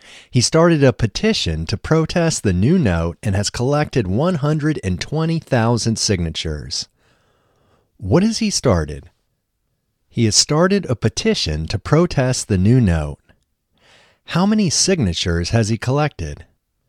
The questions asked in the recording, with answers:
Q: How many signatures has he collected?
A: He has collected 120,000 signatures.